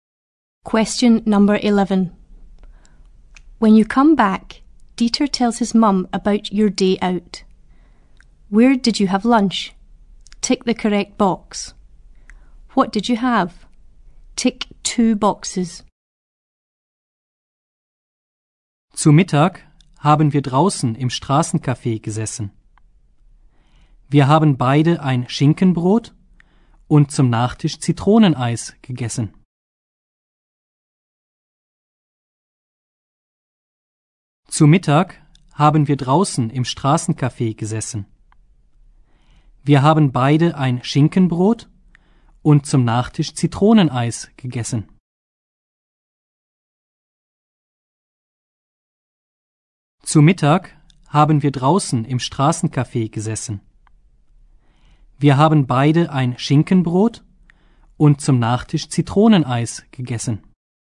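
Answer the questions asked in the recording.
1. Outside at a street café
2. Ham sandwich and lemon ice cream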